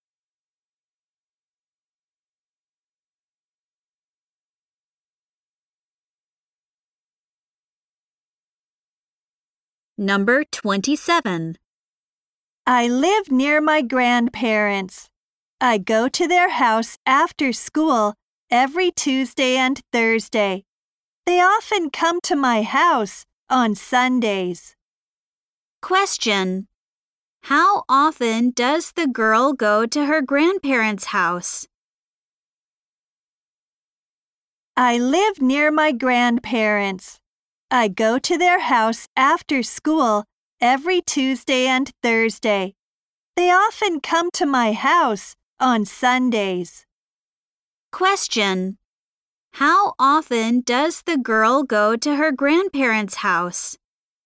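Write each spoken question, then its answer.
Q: How often does the girl go to her grandparents' house?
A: Twice a week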